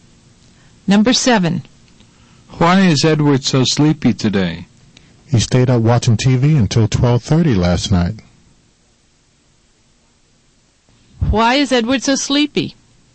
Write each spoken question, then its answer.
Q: Why is Edward so sleepy?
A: Because he watched TV until 12:30.